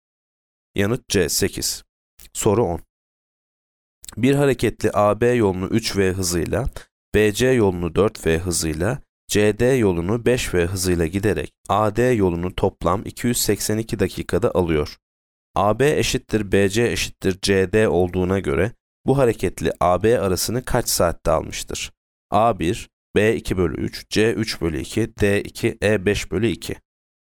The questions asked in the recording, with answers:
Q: AB eşittir BC eşittir CD olduğuna göre bu hareketli AB arasını kaç saatte almıştır?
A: Yanıt D 2.